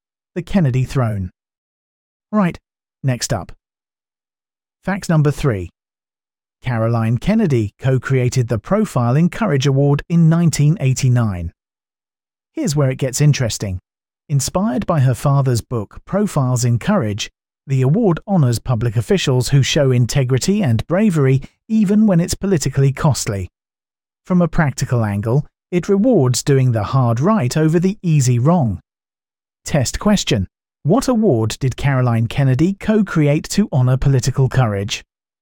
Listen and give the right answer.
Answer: Correct answer. Profile in Courage Award.